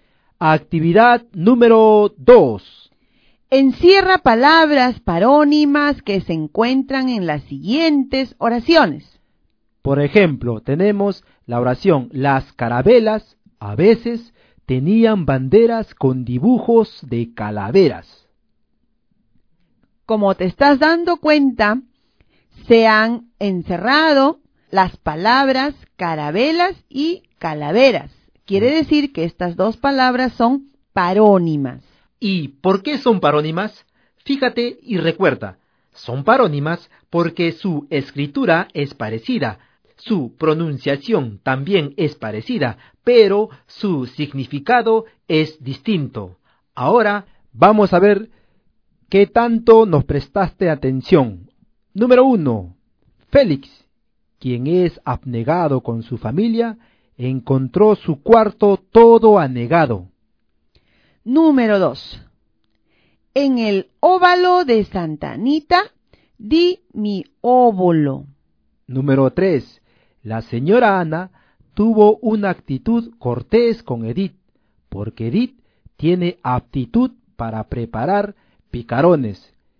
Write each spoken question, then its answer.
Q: Número 1. Félix, quien es abnegado con su familia, encontró su cuarto todo anegado.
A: encerré las palabras abnegado y anegado.

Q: Número 3. La señora Ana tuvo una actitud cortés con Edith, porque Edith tiene aptitud para preparar picarones.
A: Allí también encerré la palabra actitud y luego la palabra aptitud.